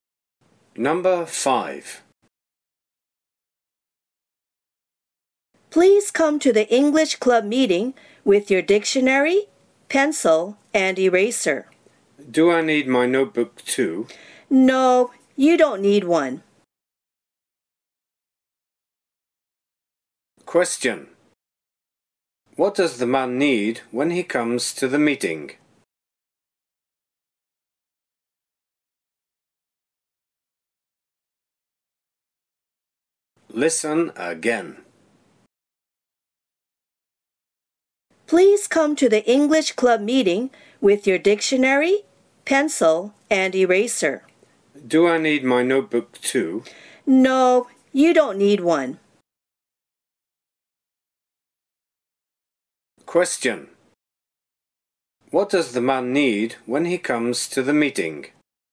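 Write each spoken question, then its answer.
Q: What does the man need when he comes to the meeting?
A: His dictionary, pencil, and eraser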